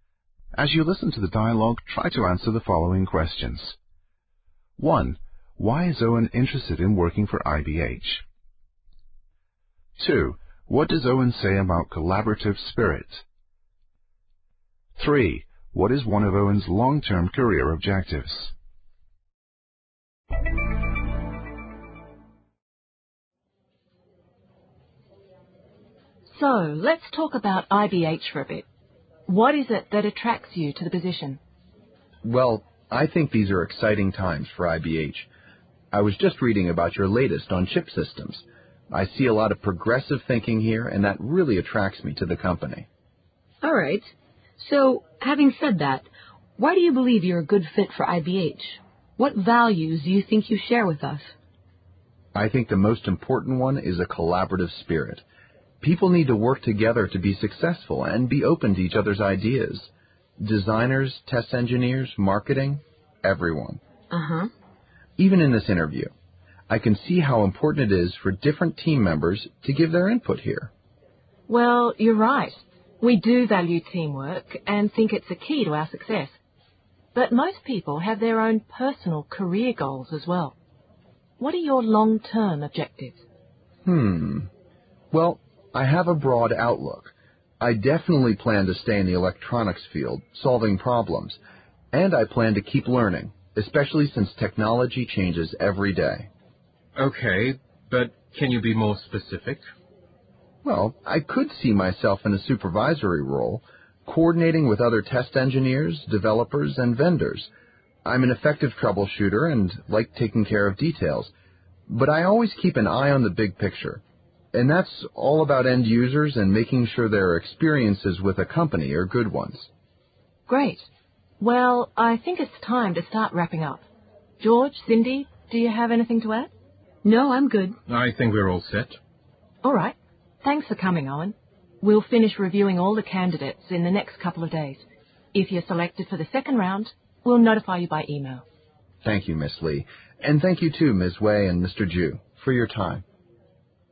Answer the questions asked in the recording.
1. He also compliments their progressive or open-minded thinking.
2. He mentions collaborative spirit, a willingness to work together as a team with each member, making contributions.
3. Owen says he could see himself in a supervisory role.